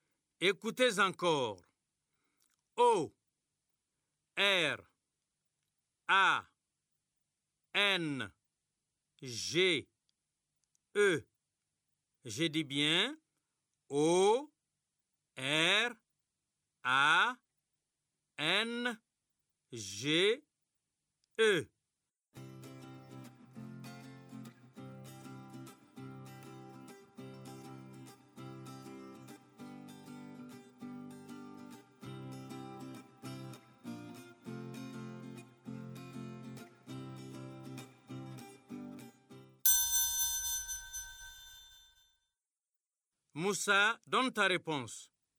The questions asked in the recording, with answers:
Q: Moussa, donne ta réponse.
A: O R A N G E. C'est orange.